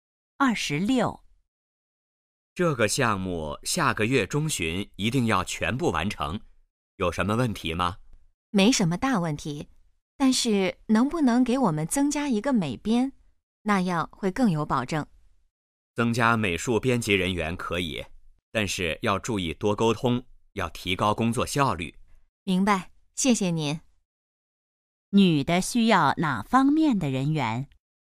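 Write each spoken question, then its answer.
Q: 女的需要哪方面的人员?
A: 美术编辑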